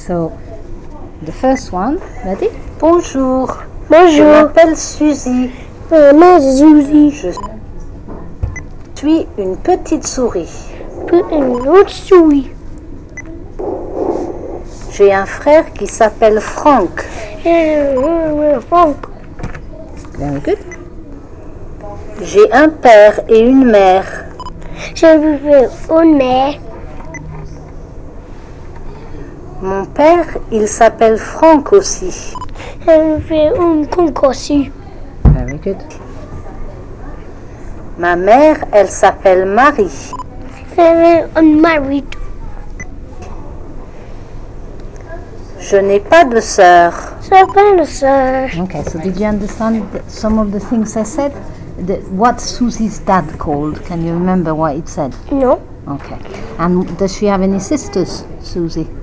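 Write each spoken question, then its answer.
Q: What Susie's dad called? Can you remember what it said?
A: Franck

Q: And does she have any sisters, Susie?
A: No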